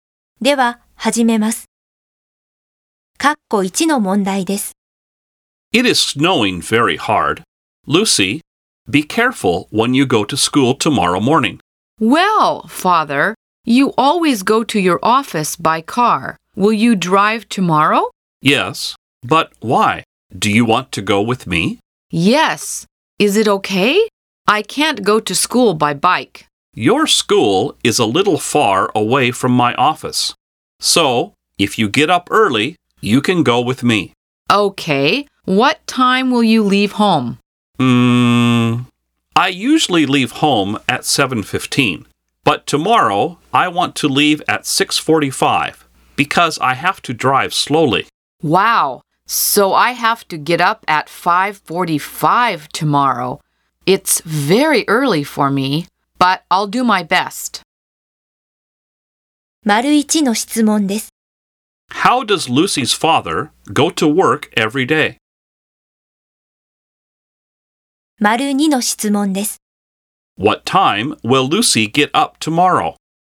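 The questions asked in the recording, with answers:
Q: How does Lucy's father go to work every day?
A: By car

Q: What time will Lucy get up tomorrow?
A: At 5:45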